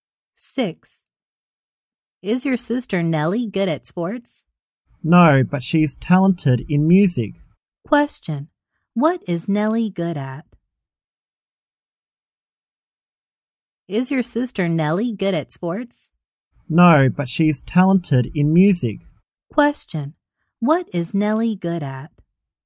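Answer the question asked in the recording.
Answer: Music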